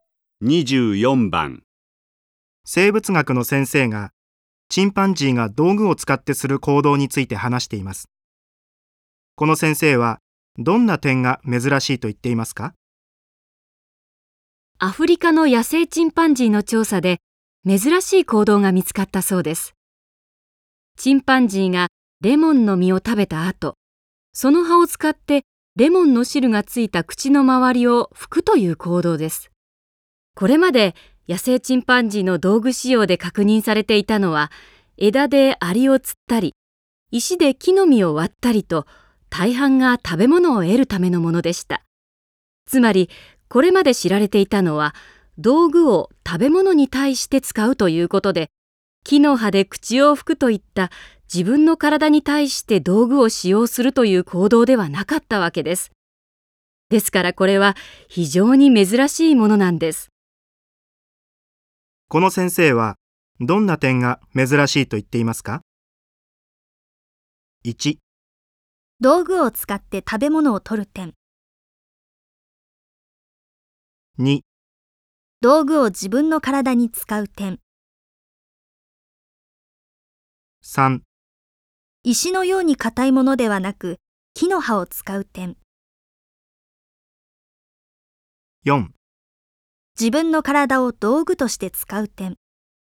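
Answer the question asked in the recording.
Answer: 2: 道具を自分の体に使う点。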